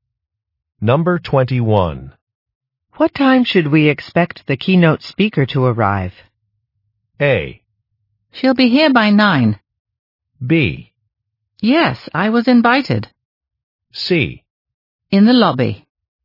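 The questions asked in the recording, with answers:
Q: What time should we expect the keynote speaker to arrive?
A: A: She'll be here by 9.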